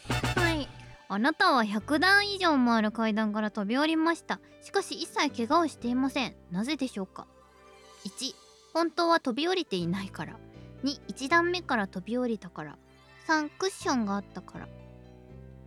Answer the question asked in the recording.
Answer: 正解答えは2、1段目から飛び降りたから。